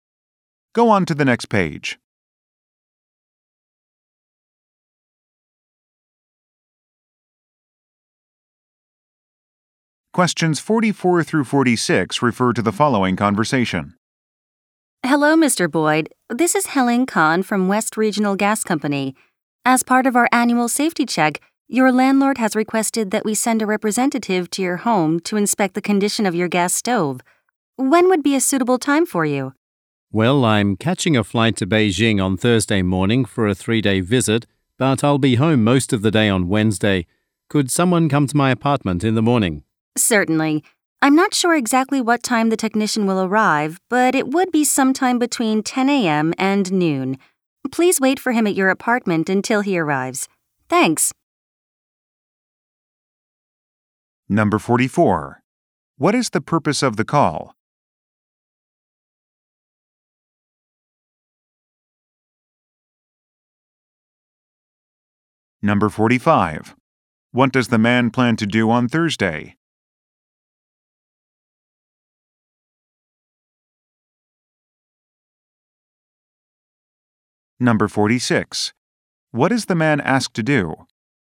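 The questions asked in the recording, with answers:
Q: What is the purpose of the call?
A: To schedule a gas stove safety inspection

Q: What does the man plan to do on Thursday?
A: Fly to Beijing

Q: What is the man asked to do?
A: Wait at his apartment for the technician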